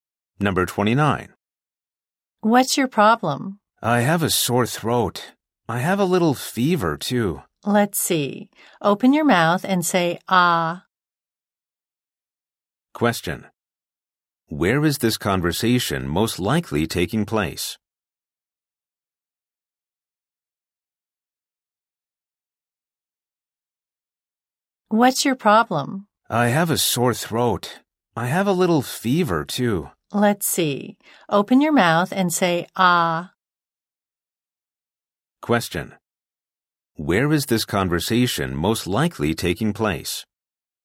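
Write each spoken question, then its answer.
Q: Where is this conversation most likely taking place?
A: At a doctor's office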